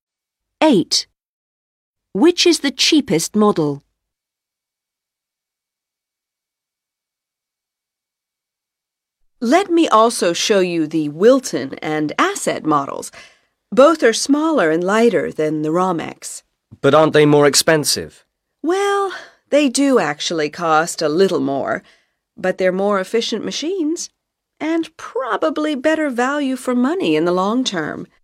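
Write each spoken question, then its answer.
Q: Which is the cheapest model?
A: The Romex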